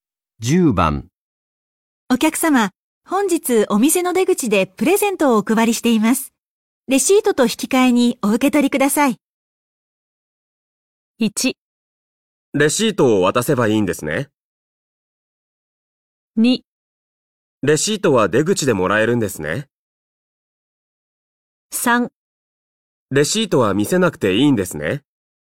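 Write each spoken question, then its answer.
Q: 本日お店の出口でプレゼントをお配りしています。レシートと引き換えにお受け取りください。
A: 1: レシートを渡せばいいんですね。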